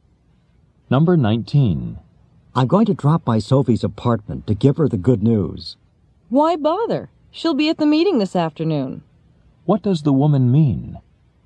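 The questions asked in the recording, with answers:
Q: What does the woman mean?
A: He can tell Sophie at the meeting this afternoon.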